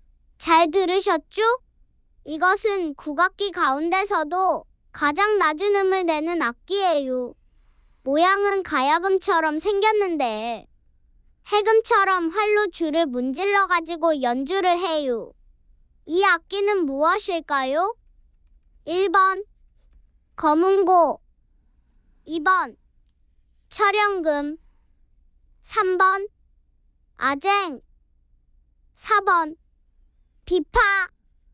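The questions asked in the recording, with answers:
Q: 이 악기는 무엇일까요?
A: 3번: 아쟁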